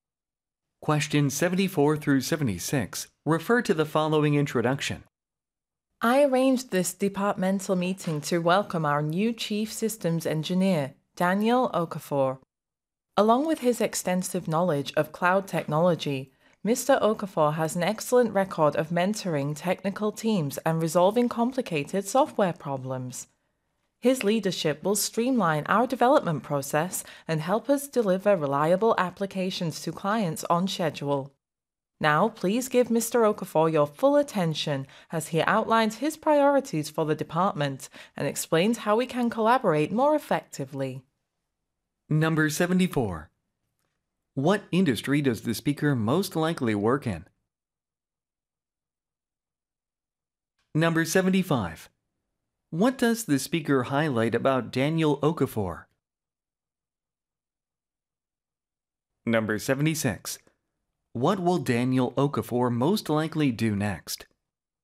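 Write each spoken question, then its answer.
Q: What industry does the speaker most likely work in?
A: Software development

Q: What does the speaker highlight about Daniel Okafor?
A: His record of mentoring technical teams and solving complicated software problems

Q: What will Daniel Okafor most likely do next?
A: Outline his priorities for the department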